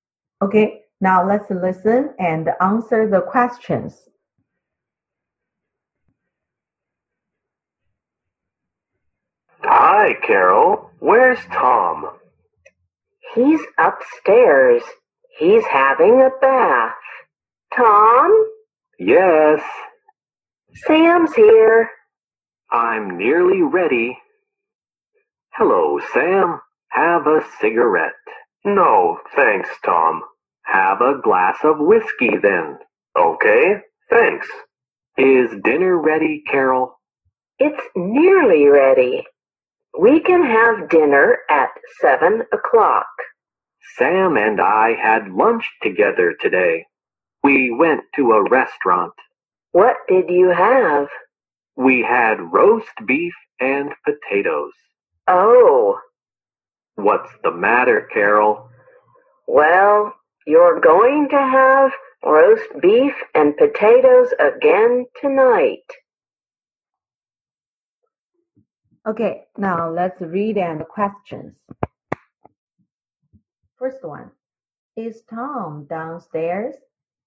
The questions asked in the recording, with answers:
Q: First one, is Tom downstairs?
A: No, he isn't.